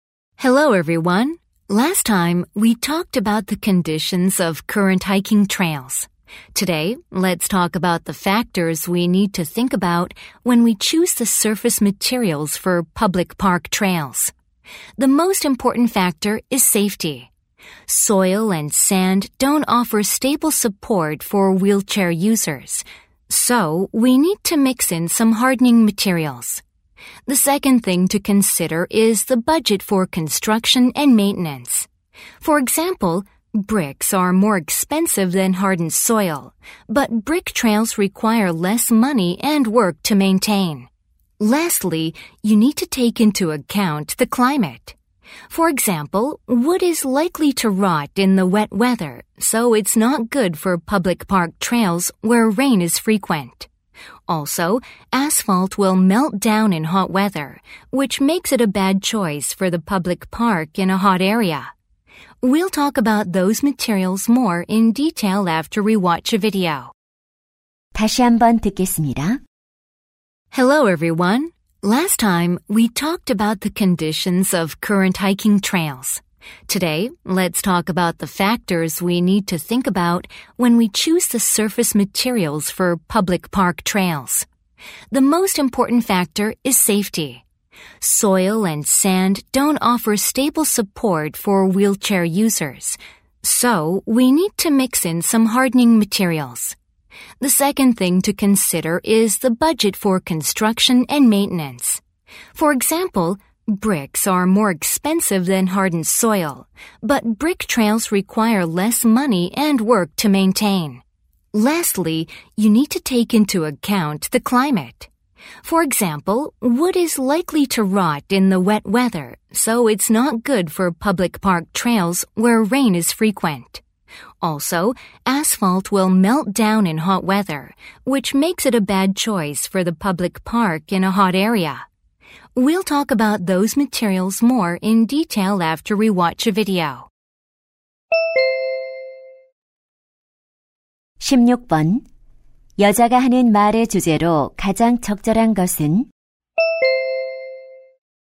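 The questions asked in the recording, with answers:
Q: 여자가 하는 말의 주제로 가장 적절한 것은?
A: 공원 산책로 표면 재료를 선택할 때 고려할 요소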